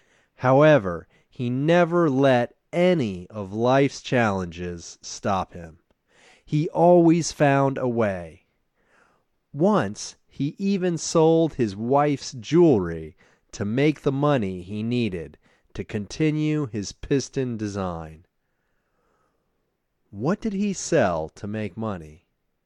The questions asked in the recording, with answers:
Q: What did he sell to make money?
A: He once sold his wife's jewelry to make money.